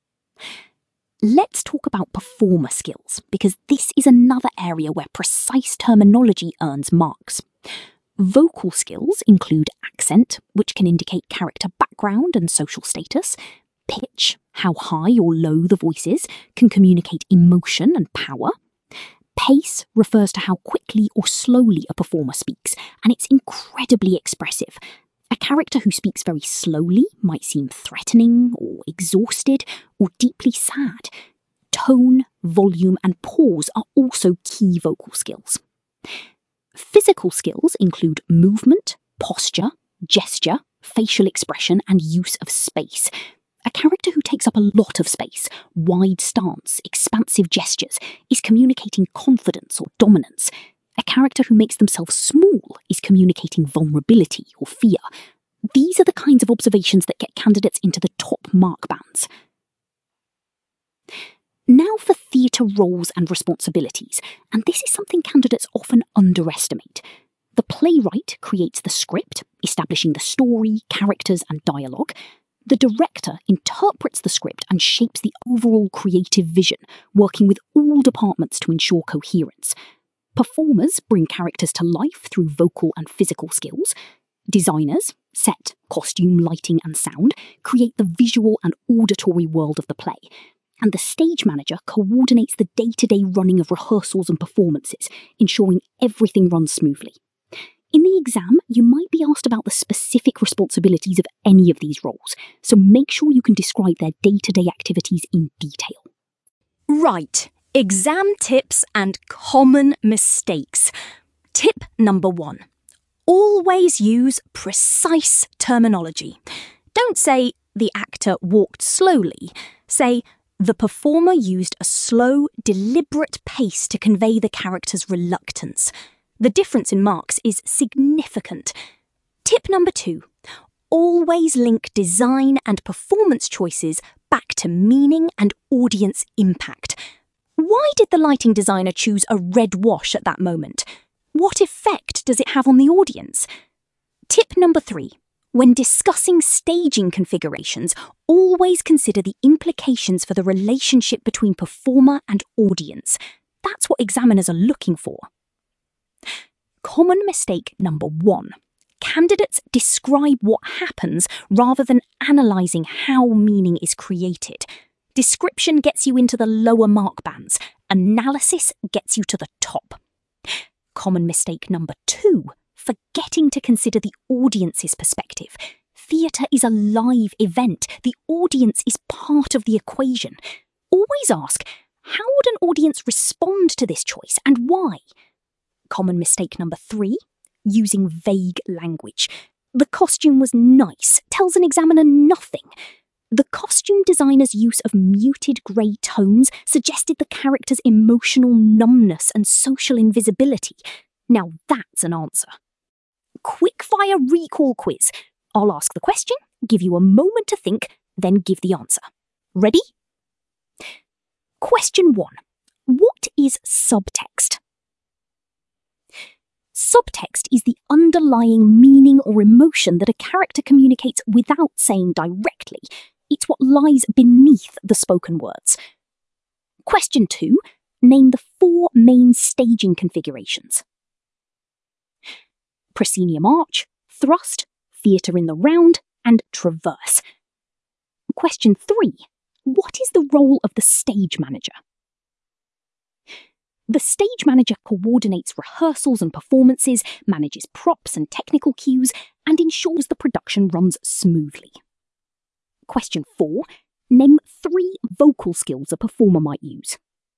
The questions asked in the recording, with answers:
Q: Name 3 vocal skills a performer might use.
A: Accent, pitch, pace, tone, volume, and pause.